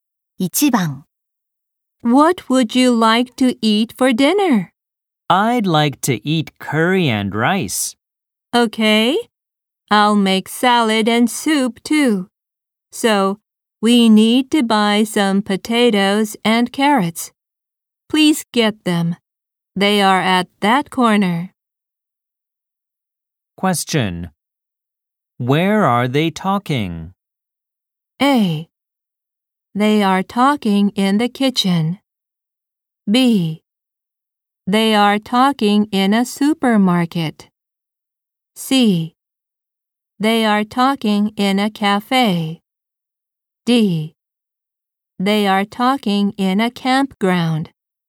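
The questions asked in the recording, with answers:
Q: Where are they talking?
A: B: They are talking in a supermarket.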